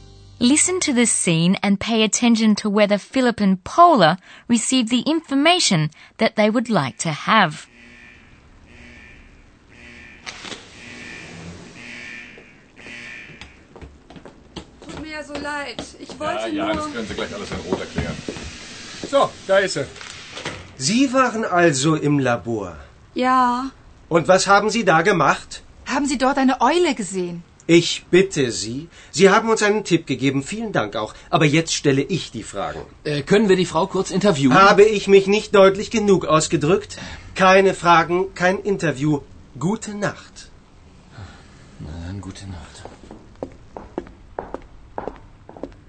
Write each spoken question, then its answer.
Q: Listen to the scene and pay attention to whether Philip and Paula received the information that they would like to have.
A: Unfortunately, Philip and Paula don't get any information.